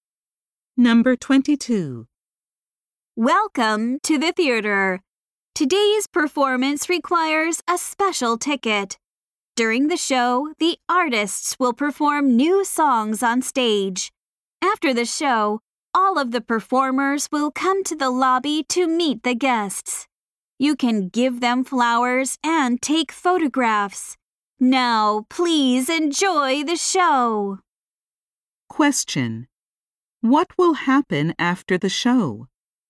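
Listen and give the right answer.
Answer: The performers will come to the lobby to meet the guests.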